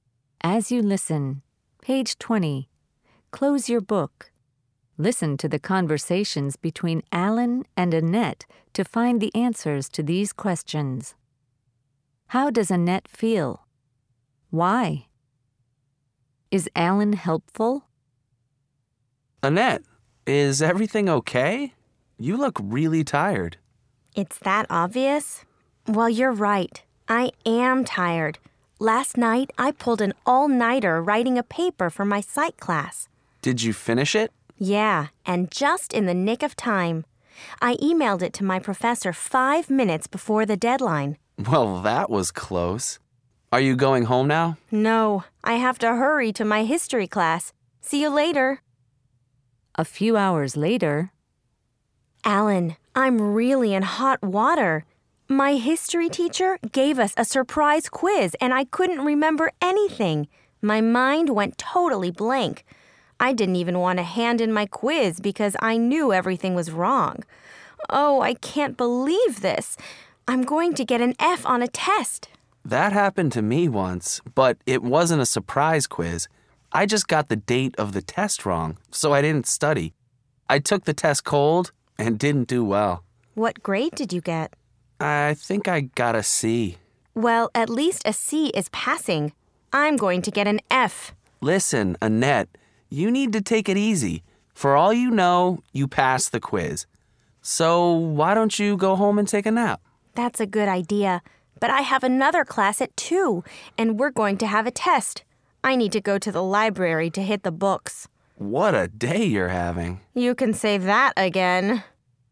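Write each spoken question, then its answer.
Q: How does Annette feel? Why?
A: Tired and worried; she stayed up all night writing a paper and thinks she failed a surprise history quiz.

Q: Is Alan helpful?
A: Yes, he tells her to take it easy and suggests she go home and take a nap.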